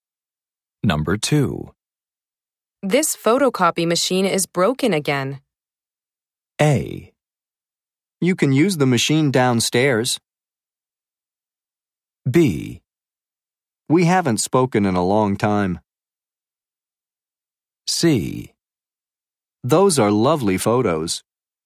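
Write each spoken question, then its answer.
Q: This photocopy machine is broken again.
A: A: You can use the machine downstairs.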